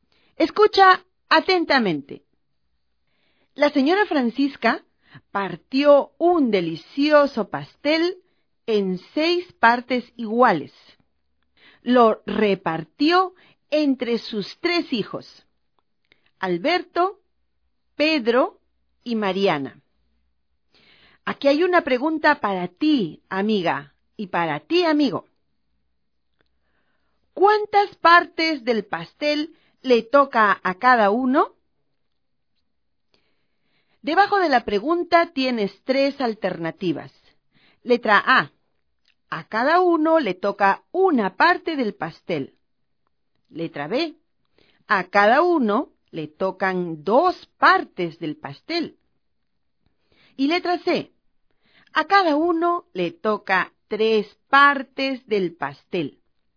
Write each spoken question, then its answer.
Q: ¿Cuántas partes del pastel le toca a cada uno?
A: Por lo tanto, la alternativa que debías marcar era la letra B.